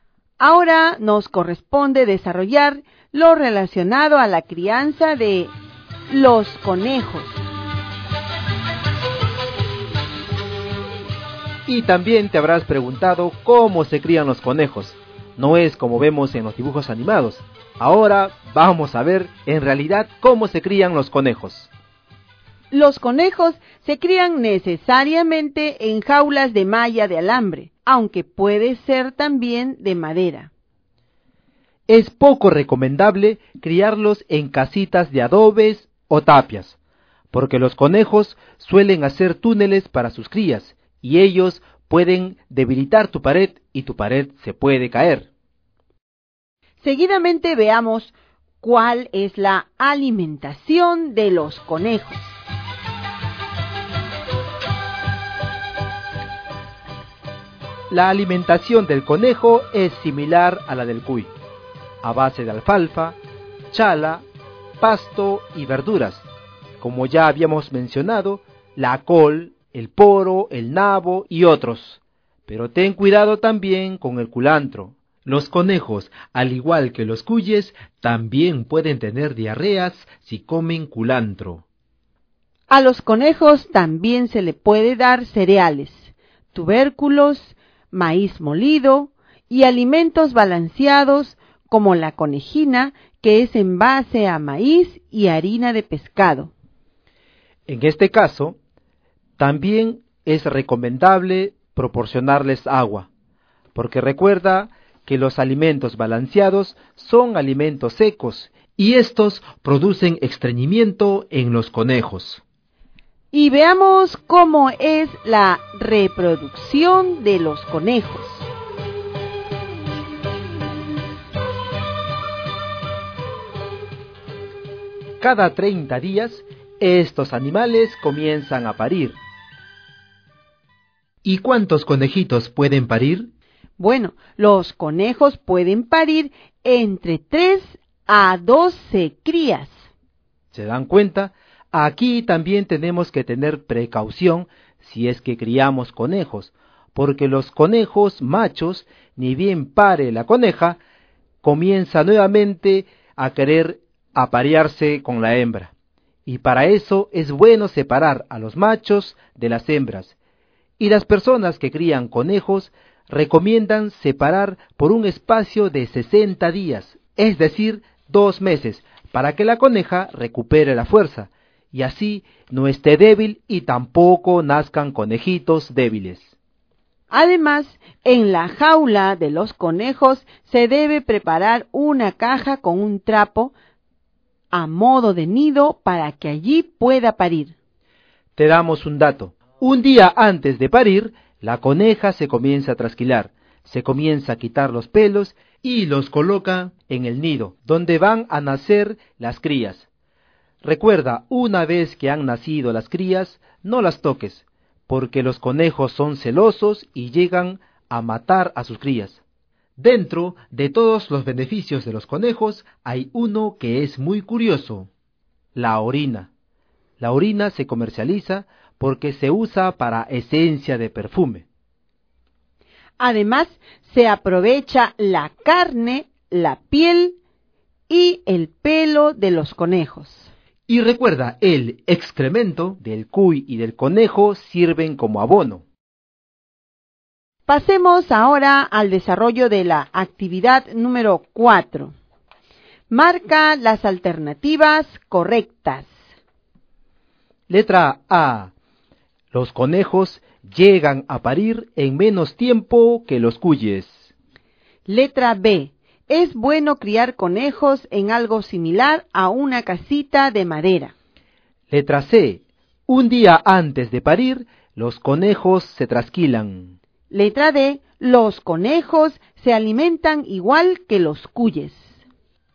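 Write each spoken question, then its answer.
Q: Los conejos llegan a parir en menos tiempo que los cuyes.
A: Correcta

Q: Un día antes de parir, los conejos se trasquilan.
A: Correcta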